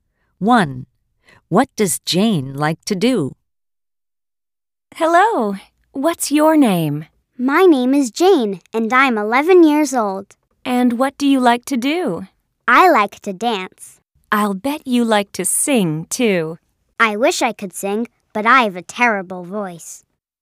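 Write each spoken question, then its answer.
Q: What does Jane like to do?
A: dance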